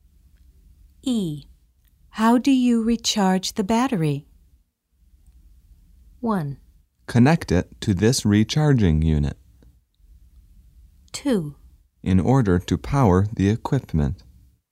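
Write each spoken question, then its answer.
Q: How do you recharge the battery?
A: 1: Connect it to this recharging unit.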